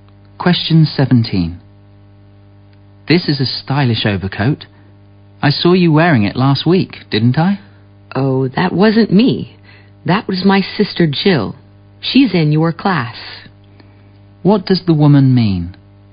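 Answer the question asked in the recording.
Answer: The man saw her sister Jill, not her, wearing the coat.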